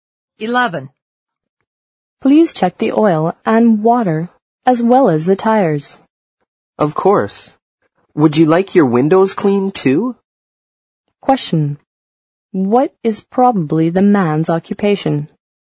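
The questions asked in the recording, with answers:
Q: What is probably the man's occupation?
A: A gas station attendant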